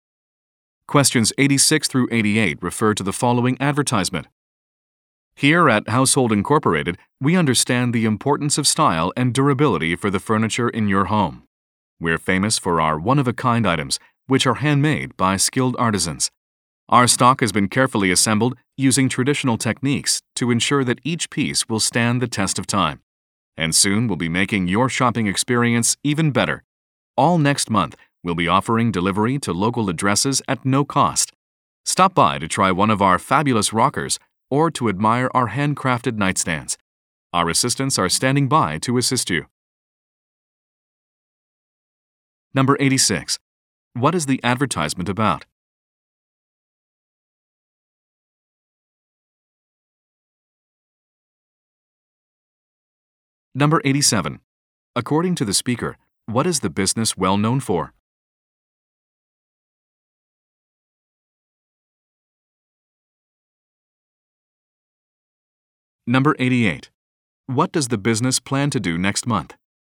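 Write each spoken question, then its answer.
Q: What is the advertisement about?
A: A furniture store

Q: According to the speaker, what is the business well known for?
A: One-of-a-kind handmade items

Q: What does the business plan to do next month?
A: Offer free delivery to local addresses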